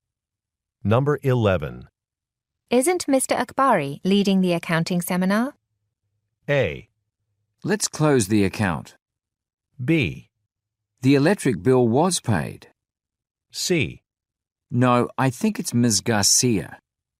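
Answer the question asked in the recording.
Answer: C: No, I think it's Ms. Garcia.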